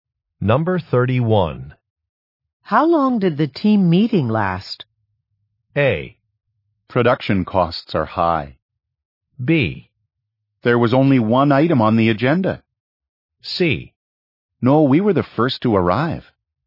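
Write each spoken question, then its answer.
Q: How long did the team meeting last?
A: B: There was only one item on the agenda.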